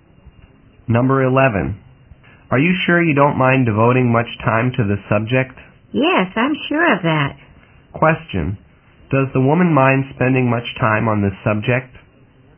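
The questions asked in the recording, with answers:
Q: Does the woman mind spending much time on this subject?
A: No, she doesn't mind.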